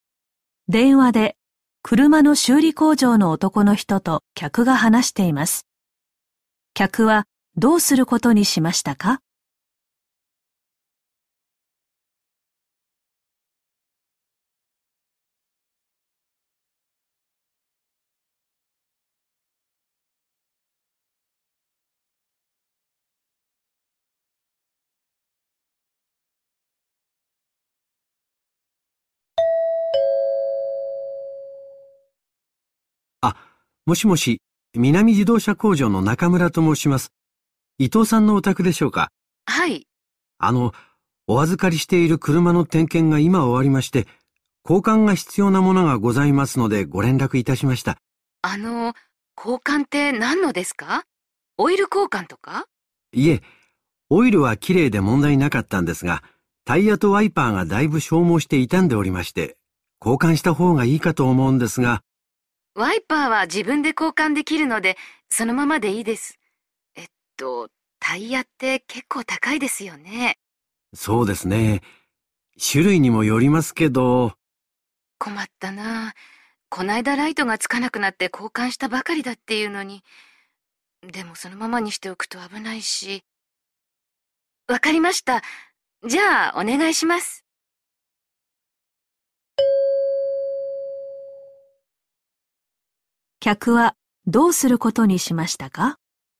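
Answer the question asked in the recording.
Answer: タイヤだけ交換してもらう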